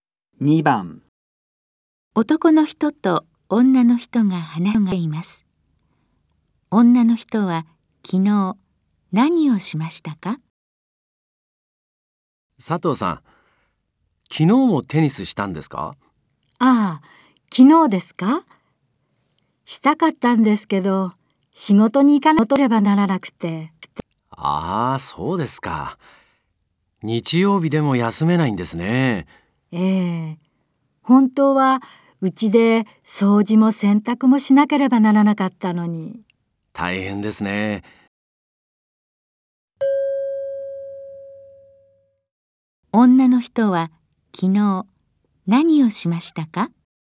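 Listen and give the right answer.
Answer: 仕事に行きました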